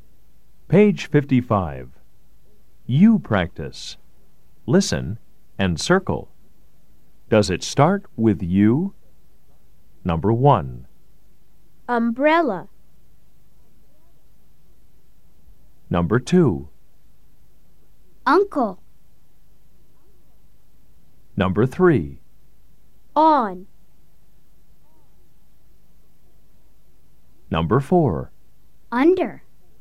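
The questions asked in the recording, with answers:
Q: Does it start with you?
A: Yes

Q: Does it start with you?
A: Yes

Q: Does it start with you?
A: No

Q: Does it start with you?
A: Yes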